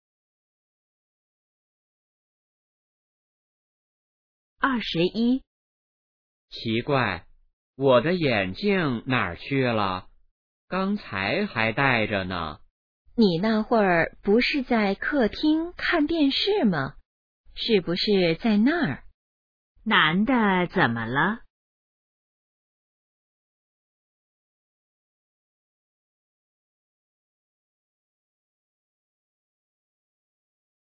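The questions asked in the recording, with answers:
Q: 男的怎么了?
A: 找不到眼镜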